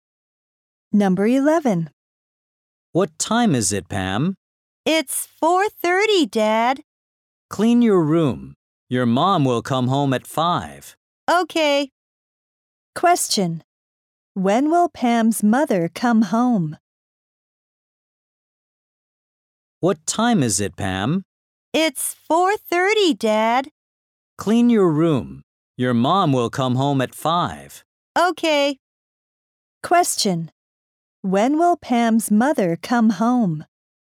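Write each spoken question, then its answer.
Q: When will Pam's mother come home?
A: At 5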